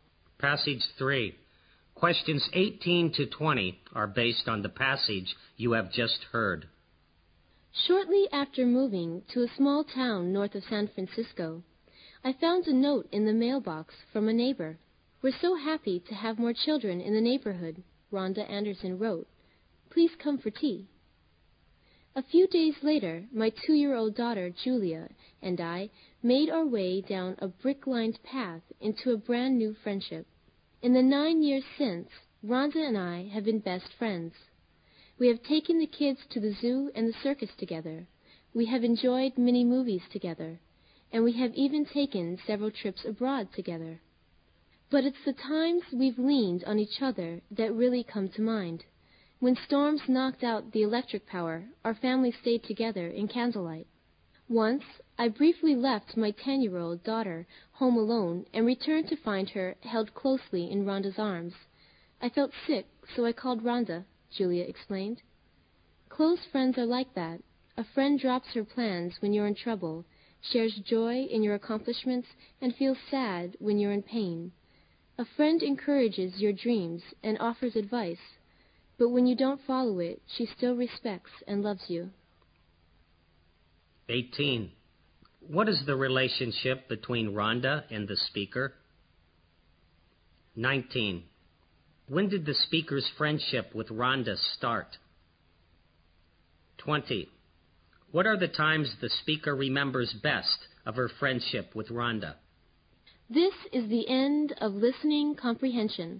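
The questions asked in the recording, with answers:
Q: What is the relationship between Rhonda and the speaker?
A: Neighbors and best friends

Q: When did the speaker's friendship with Rhonda start?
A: Shortly after she moved to the town, nine years ago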